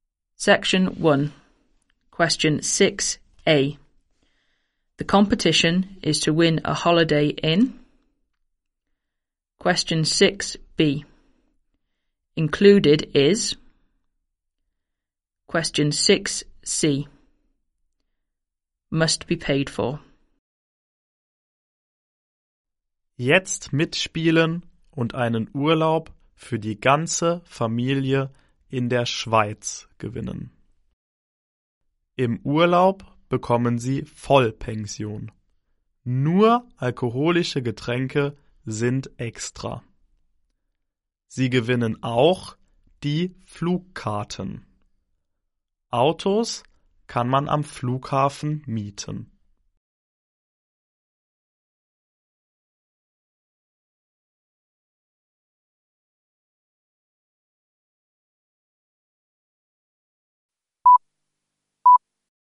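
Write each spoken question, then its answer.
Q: The competition is to win a holiday in.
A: Switzerland

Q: Included is.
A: Full board and the flights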